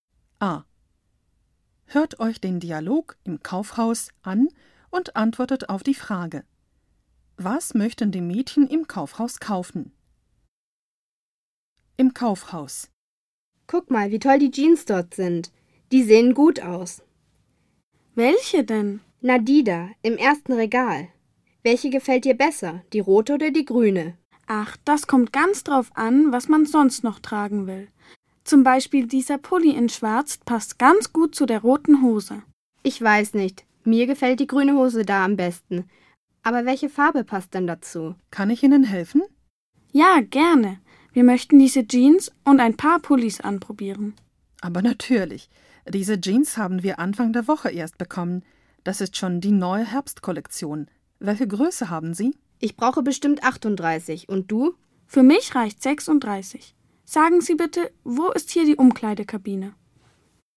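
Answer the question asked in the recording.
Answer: Jeans und Pullis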